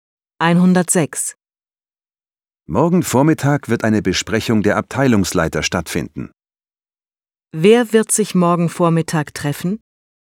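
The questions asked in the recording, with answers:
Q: Wer wird sich morgen Vormittag treffen?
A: Die Abteilungsleiter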